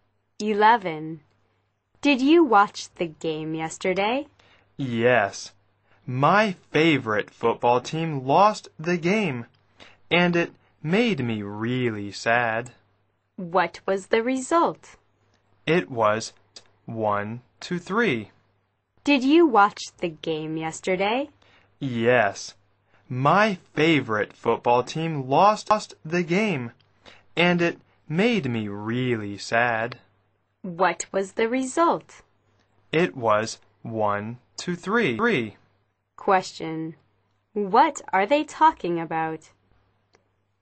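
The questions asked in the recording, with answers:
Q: What are they talking about?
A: A football game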